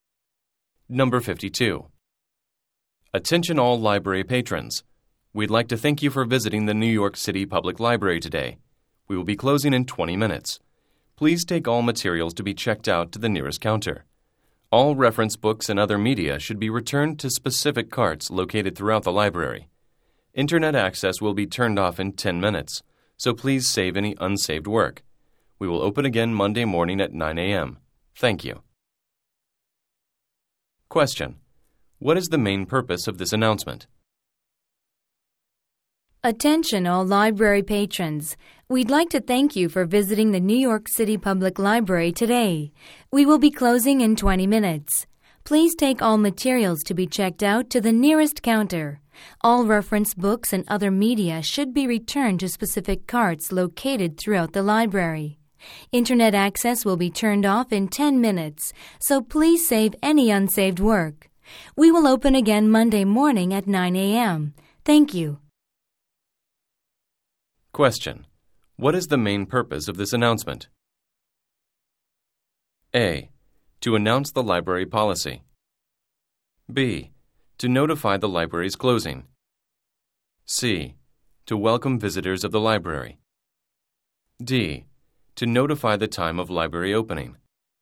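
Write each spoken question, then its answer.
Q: What is the main purpose of this announcement?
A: B: To notify the library's closing.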